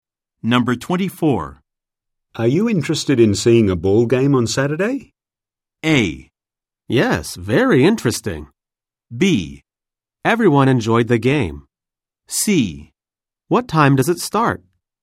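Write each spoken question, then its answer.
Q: Are you interested in seeing a ball game on Saturday?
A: C: What time does it start?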